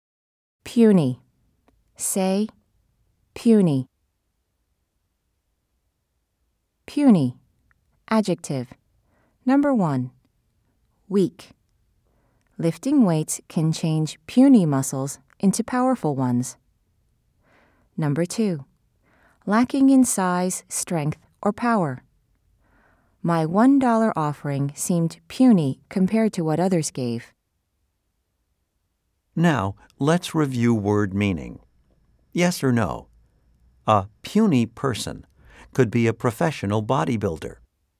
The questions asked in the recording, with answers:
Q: Yes or no? A puny person could be a professional bodybuilder.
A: If you said no, you are right.